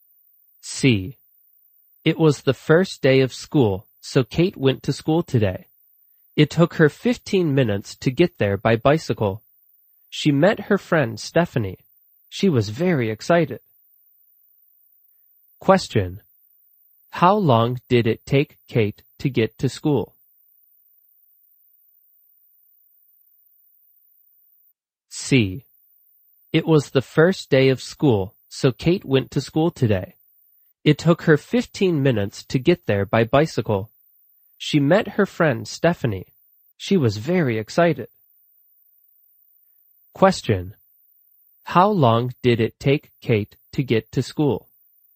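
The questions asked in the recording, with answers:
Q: How long did it take Kate to get to school?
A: 15 minutes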